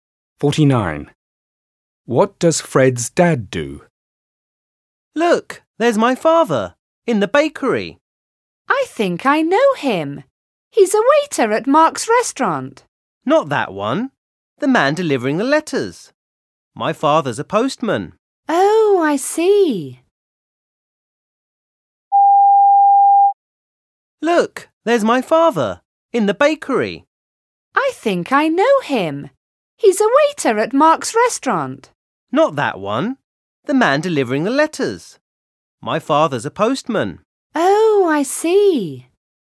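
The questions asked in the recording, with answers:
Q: What does Fred's dad do?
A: He's a postman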